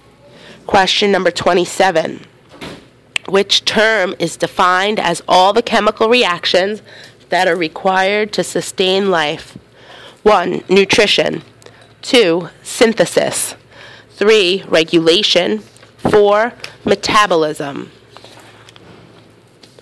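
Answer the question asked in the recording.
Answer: 4: Metabolism.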